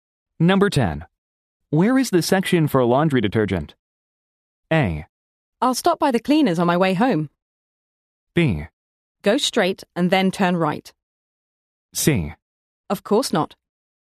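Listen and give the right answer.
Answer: B: Go straight and then turn right.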